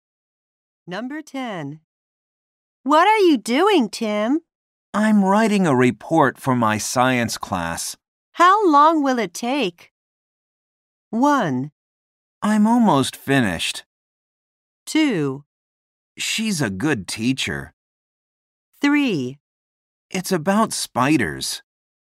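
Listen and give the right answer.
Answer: 1: I'm almost finished.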